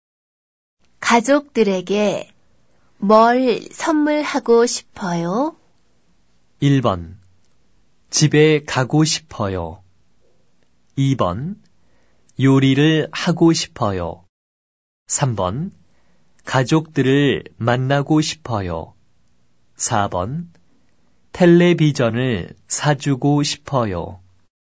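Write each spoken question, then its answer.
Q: 가족들에게 뭘 선물하고 싶어요?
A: 4: 텔레비전을 사주고 싶어요.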